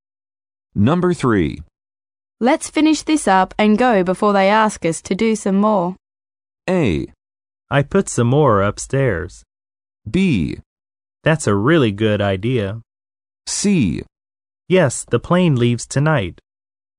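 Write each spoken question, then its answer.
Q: Let's finish this up and go before they ask us to do some more.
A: B: That's a really good idea.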